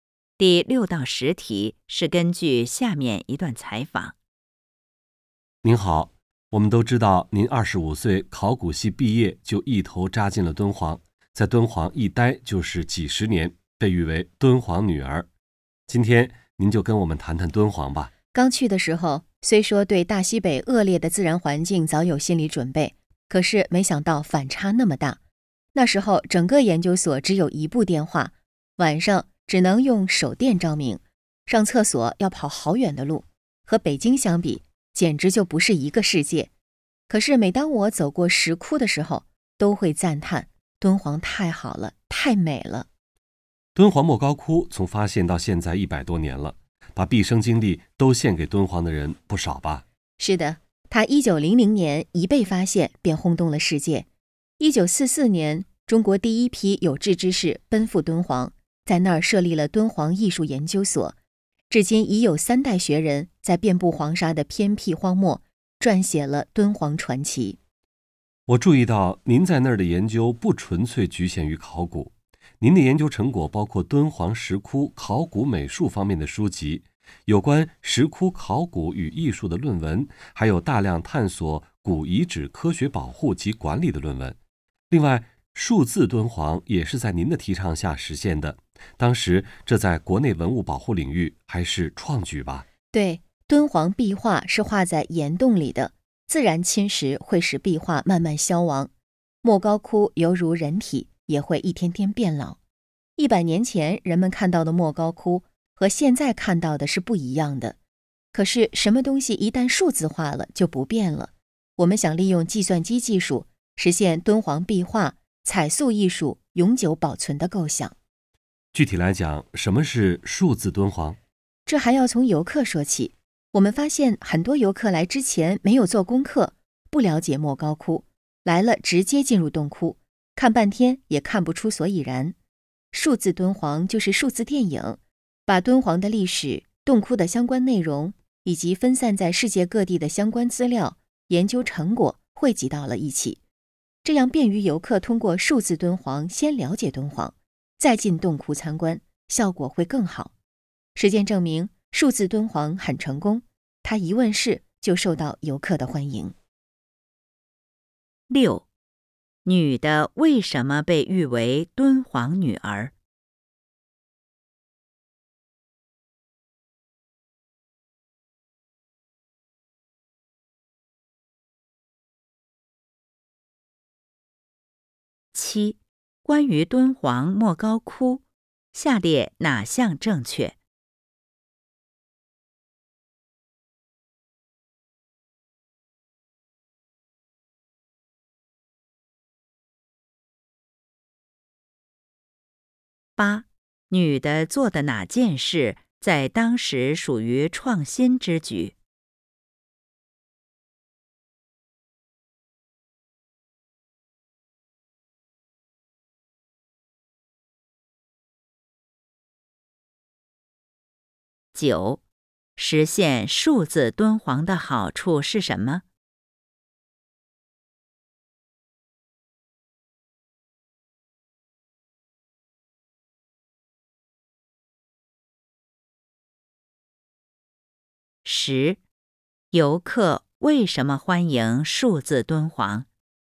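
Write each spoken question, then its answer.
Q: 女的为什么被誉为敦煌女儿?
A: 她毕业后在敦煌一待就是几十年

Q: 女的做的哪件事在当时属于创新之举?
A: 提倡实现数字敦煌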